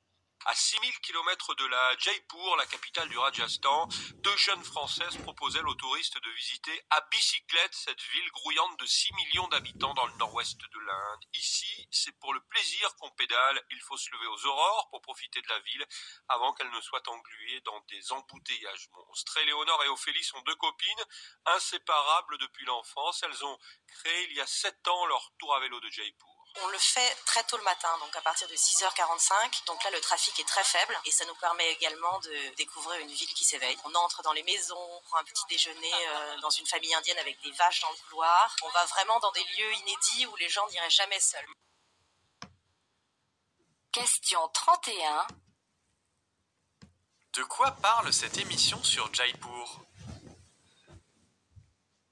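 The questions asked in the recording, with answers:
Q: De quoi parle cette émission sur Jaipur ?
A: De visites de Jaipur à vélo, tôt le matin, proposées aux touristes par deux jeunes Françaises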